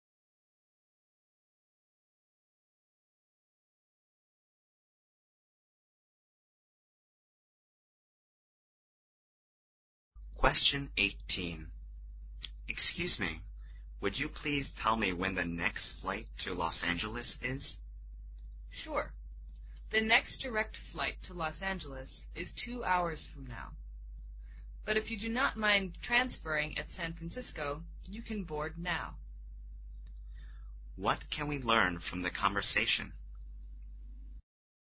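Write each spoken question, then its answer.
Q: What can we learn from the conversation?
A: The man can board a flight now if he transfers at San Francisco.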